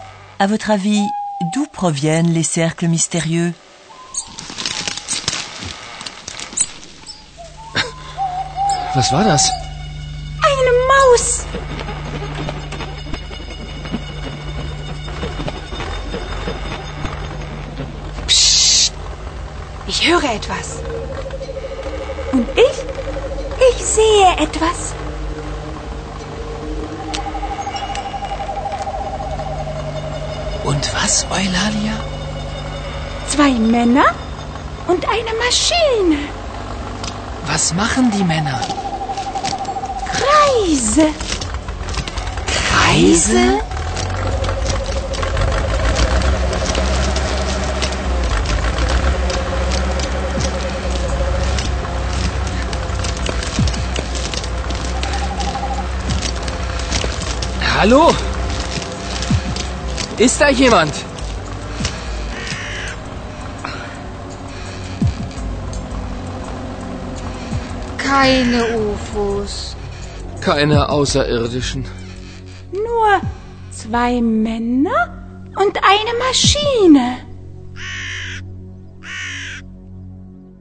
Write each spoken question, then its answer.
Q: À votre avis, d'où proviennent les cercles mystérieux?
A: Deux hommes, vraisemblablement des habitants du village, ont dessiné des cercles dans le blé avec une machine.